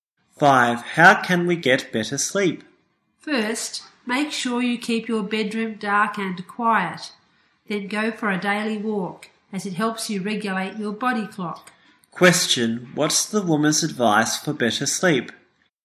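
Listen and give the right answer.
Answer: Keep the bedroom dark and quiet and go for a daily walk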